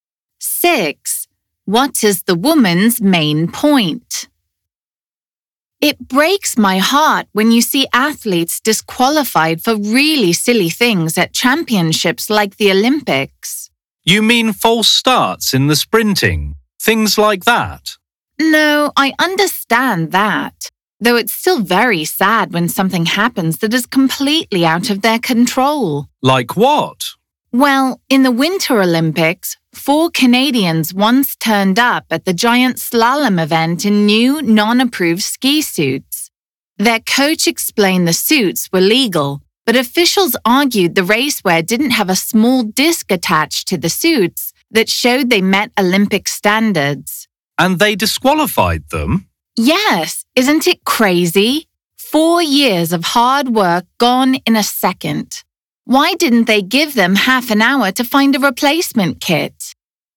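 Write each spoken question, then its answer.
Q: What is the woman's main point?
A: It is unfair when athletes are disqualified for small things out of their control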